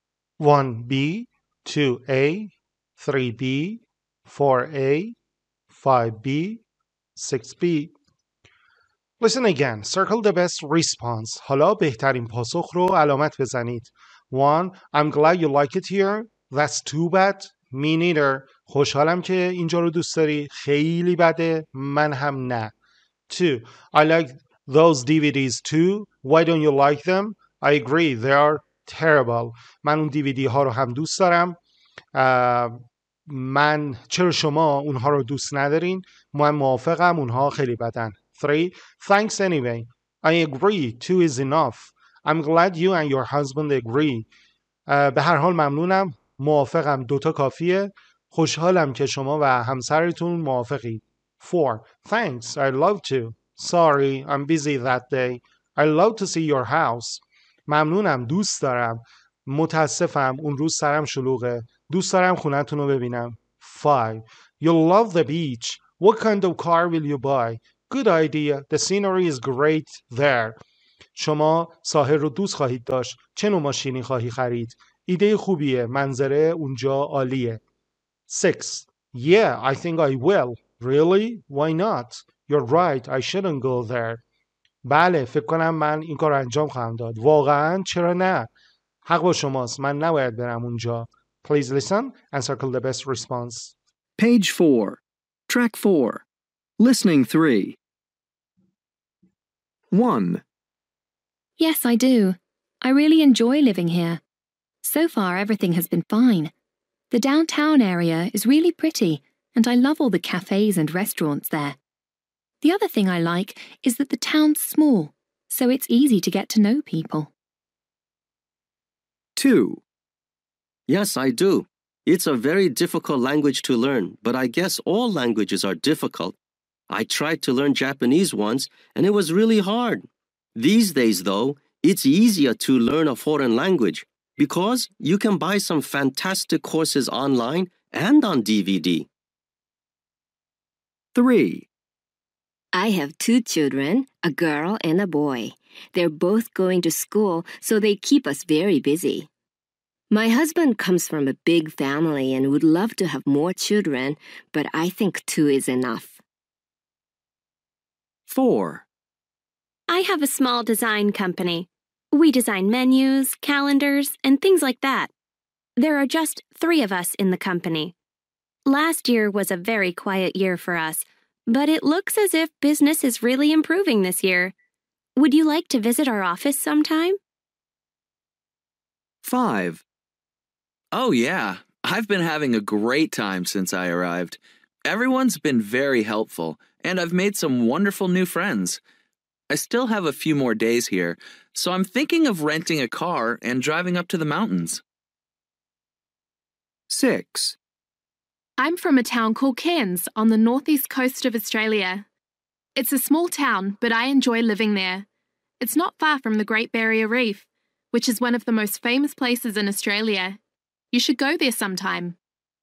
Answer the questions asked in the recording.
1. 1A
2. 2A
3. 3B
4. 4A
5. 5C
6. 6A